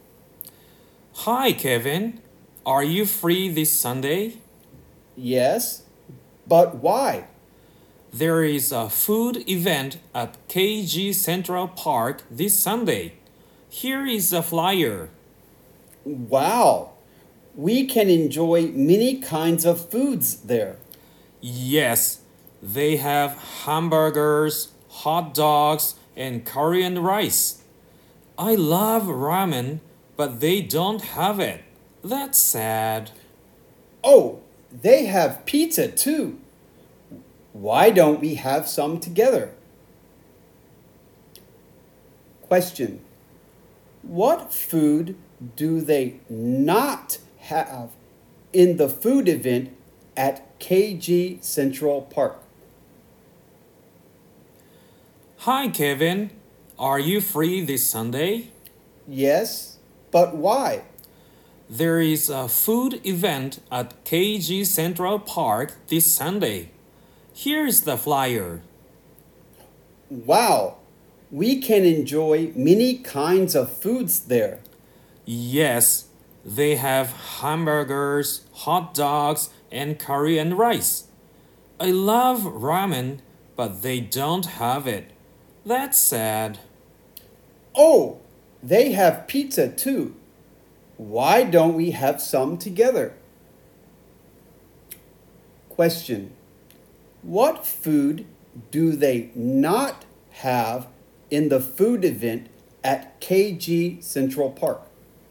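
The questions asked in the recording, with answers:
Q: What food do they not have in the food event at KG Central Park?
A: Ramen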